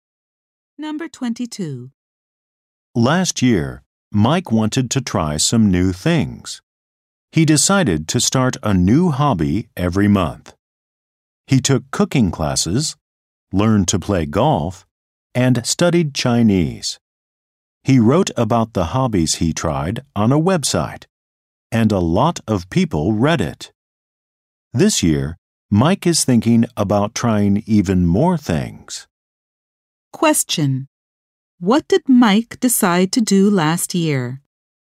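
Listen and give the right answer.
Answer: Start a new hobby every month.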